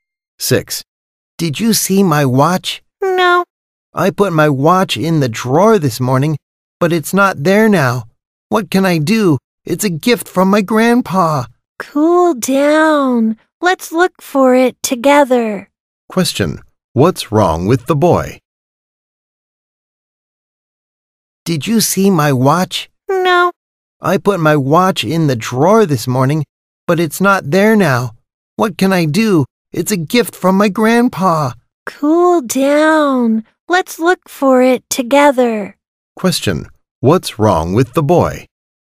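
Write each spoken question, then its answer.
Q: Question, what's wrong with the boy?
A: He can't find his watch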